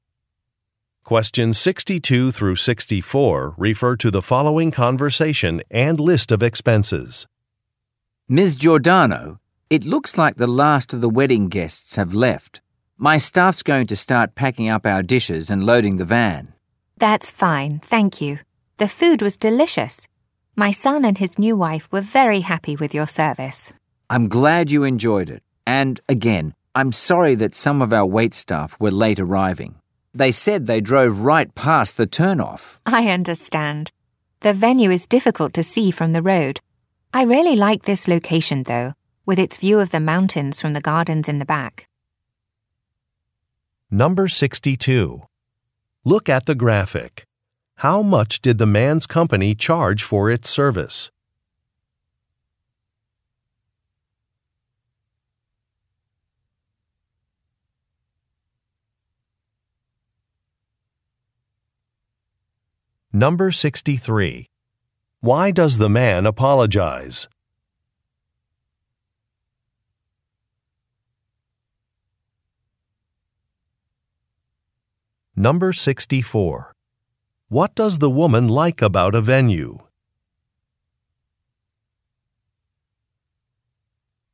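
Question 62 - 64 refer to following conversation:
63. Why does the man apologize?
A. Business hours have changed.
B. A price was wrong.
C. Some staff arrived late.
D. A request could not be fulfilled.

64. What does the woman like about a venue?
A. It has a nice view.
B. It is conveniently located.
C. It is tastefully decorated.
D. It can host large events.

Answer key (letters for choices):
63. C
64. A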